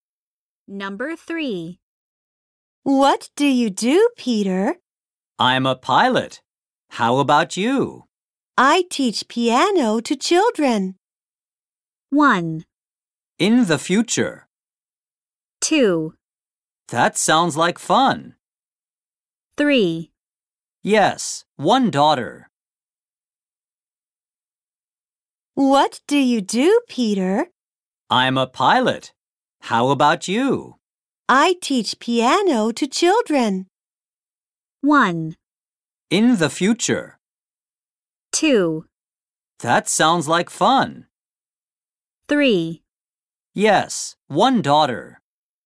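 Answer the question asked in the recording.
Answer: 2: That sounds like fun.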